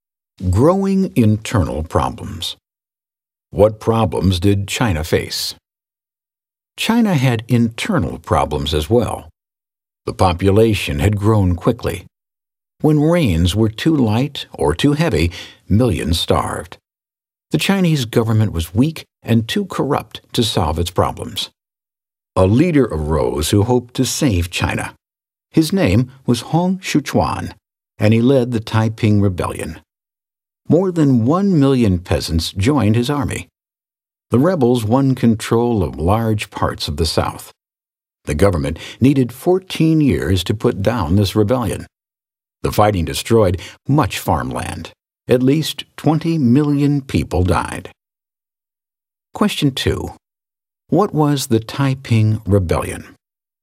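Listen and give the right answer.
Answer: A peasant rebellion led by Hong Xiuquan that won control of large parts of the south, took 14 years to put down, and left at least 20 million dead.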